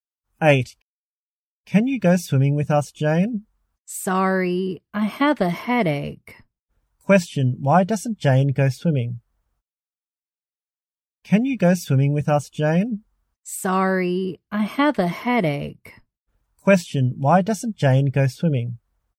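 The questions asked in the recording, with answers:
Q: Question. Why doesn't Jane go swimming?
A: She has a headache.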